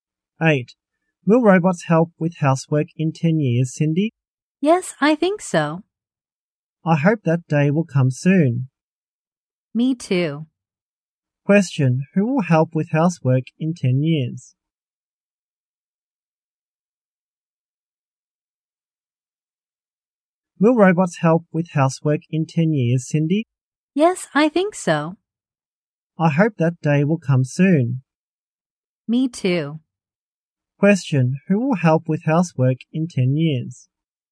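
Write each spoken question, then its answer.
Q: Question, who will help with housework in 10 years?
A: Robots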